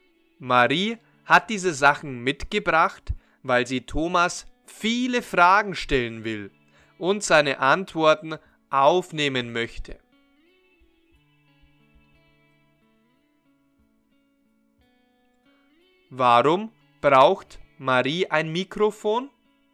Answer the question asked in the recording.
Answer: Weil sie Thomas viele Fragen stellen will und seine Antworten aufnehmen möchte.